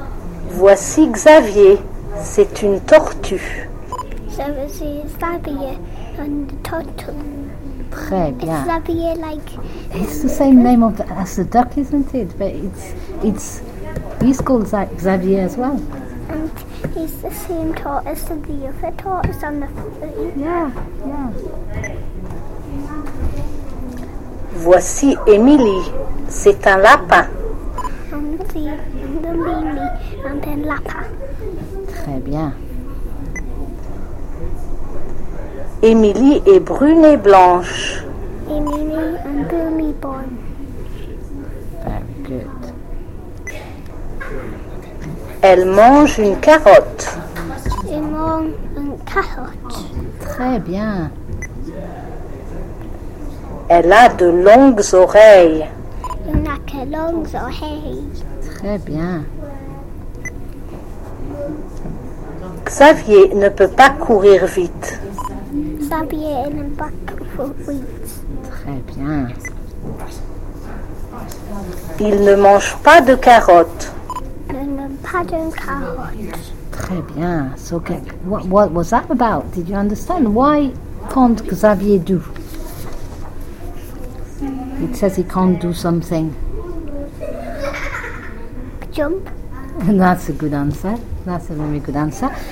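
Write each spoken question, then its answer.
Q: Why can't Xavier do?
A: Run fast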